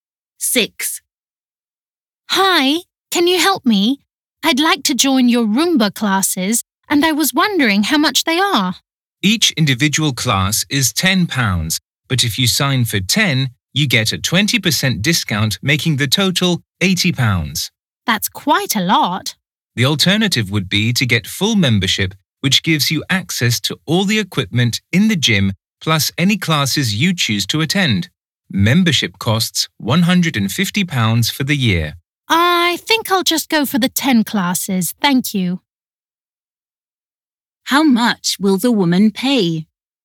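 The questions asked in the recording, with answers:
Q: How much will the woman pay?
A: £80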